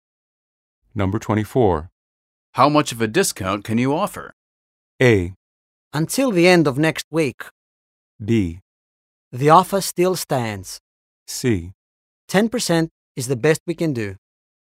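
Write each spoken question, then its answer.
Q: How much of a discount can you offer?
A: C: 10% is the best we can do.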